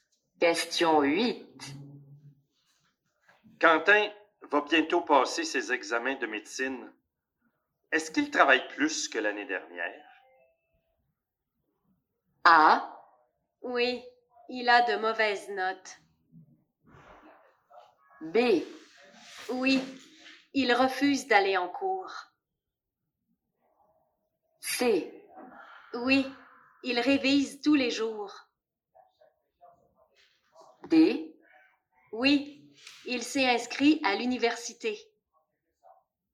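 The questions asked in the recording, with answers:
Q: Est-ce qu'il travaille plus que l'année dernière?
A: C: Oui, il révise tous les jours.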